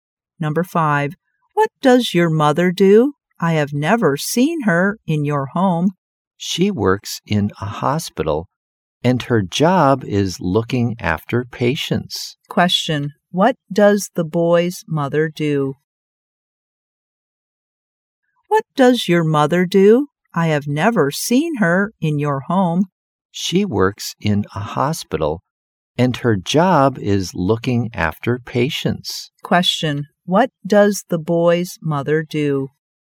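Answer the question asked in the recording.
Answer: She is a nurse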